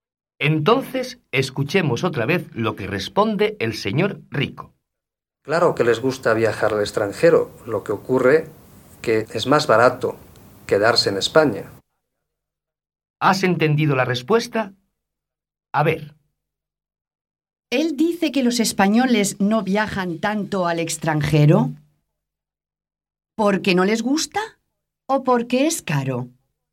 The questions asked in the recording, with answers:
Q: ¿Él dice que los españoles no viajan tanto al extranjero? ¿Porque no les gusta o porque es caro?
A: Porque es caro. Es más barato quedarse en su país.